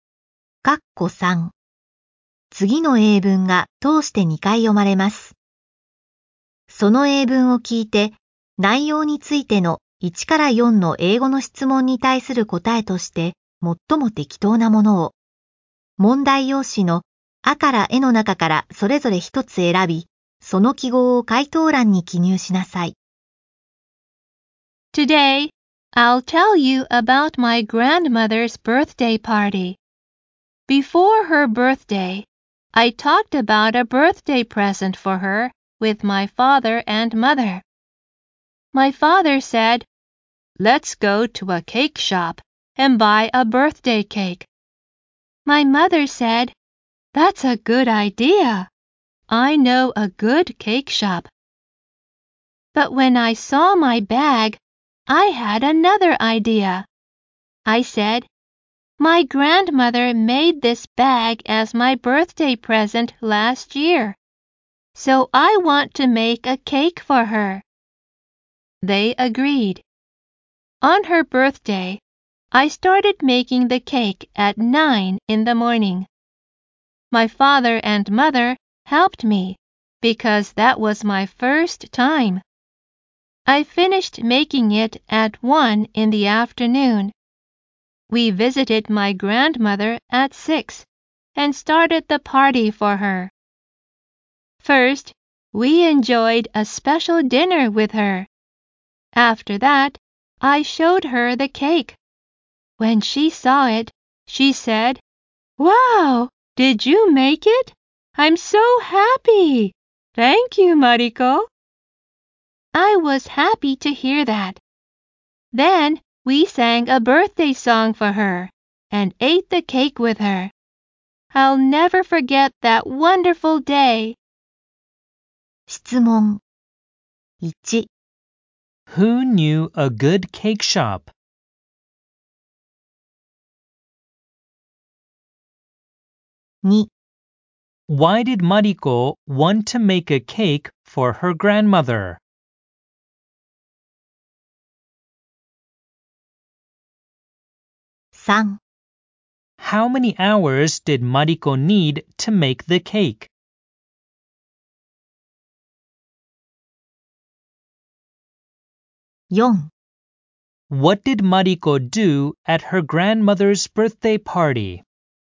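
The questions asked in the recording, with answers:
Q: Who knew a good cake shop?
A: Mariko's mother

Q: Why did Mariko want to make a cake for her grandmother?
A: Because her grandmother made her a bag as a birthday present last year

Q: How many hours did Mariko need to make the cake?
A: Four hours

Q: What did Mariko do at her grandmother's birthday party?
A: She had a special dinner, showed her the cake, sang a birthday song and ate the cake with her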